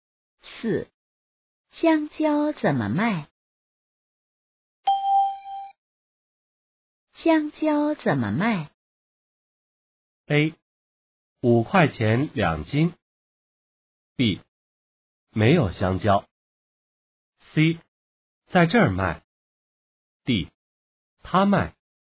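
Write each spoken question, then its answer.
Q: 香蕉怎么卖?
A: A: 五块钱两斤。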